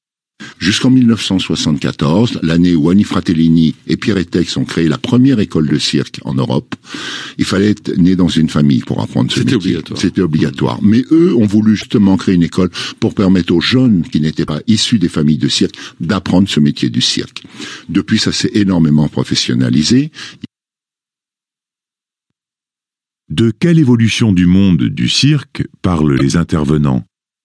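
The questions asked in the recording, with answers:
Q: De quelle évolution du monde du cirque parlent les intervenants ?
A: L'ouverture de l'apprentissage du cirque aux jeunes qui ne sont pas issus de familles de cirque, grâce à la première école (1974), et sa professionnalisation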